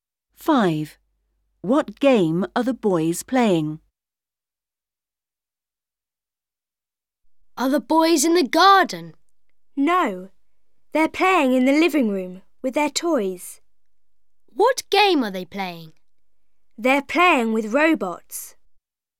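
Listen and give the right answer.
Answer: Playing with robots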